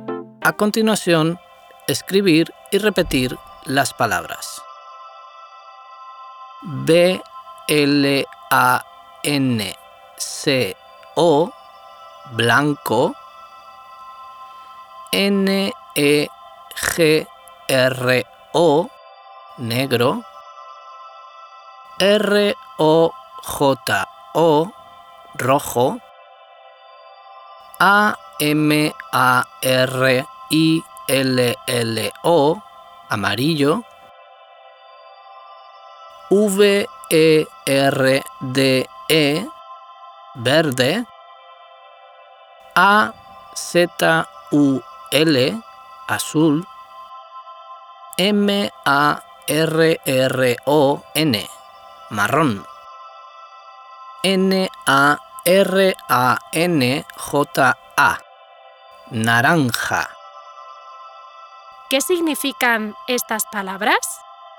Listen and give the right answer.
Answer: Muy bien, son colores.